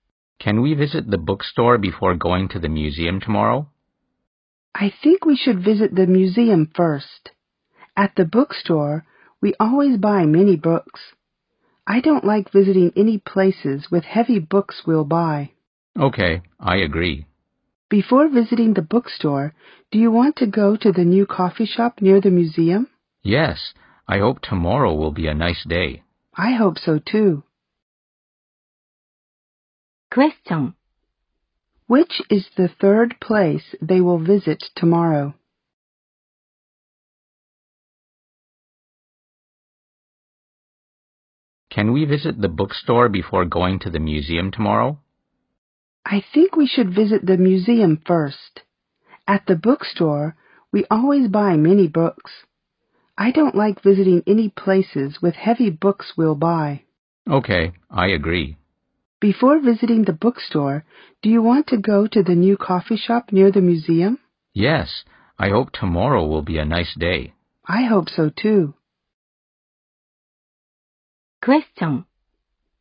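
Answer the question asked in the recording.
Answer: The bookstore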